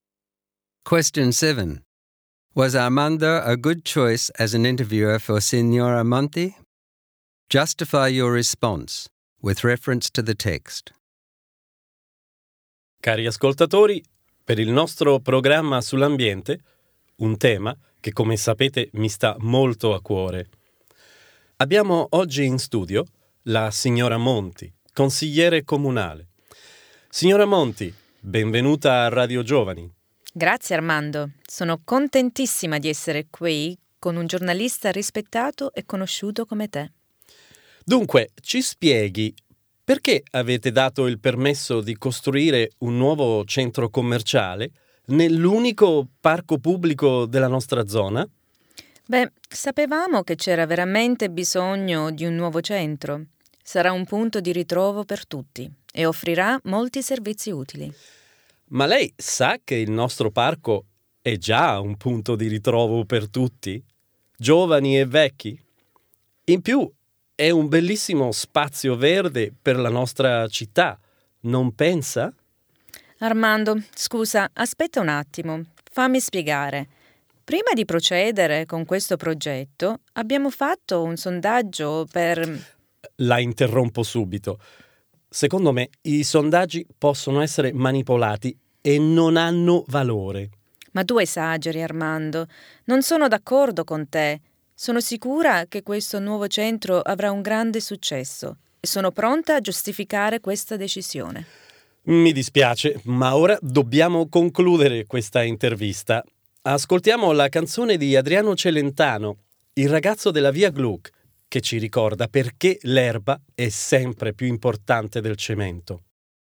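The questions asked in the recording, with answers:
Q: Was Armando a good choice as an interviewer for Signora Monti?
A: No. He was biased toward the environment, interrupted her, dismissed her survey and ended the interview before she could justify the decision.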